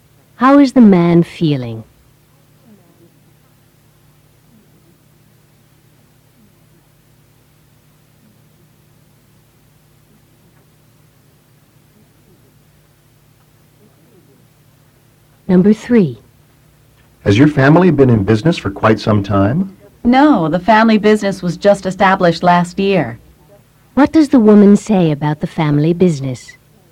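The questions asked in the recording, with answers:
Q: What does the woman say about the family business?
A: It was only established last year.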